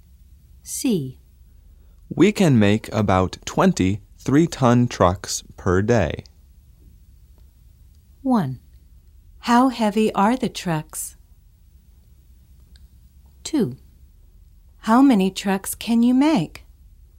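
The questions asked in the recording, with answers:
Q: How heavy are the trucks?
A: 3 tons

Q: How many trucks can you make?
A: About 20 per day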